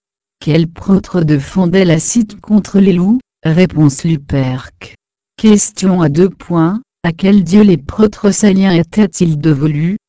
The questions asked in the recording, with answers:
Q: À quel dieu les prêtres saliens étaient-ils dévolus?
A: Réponse Mars.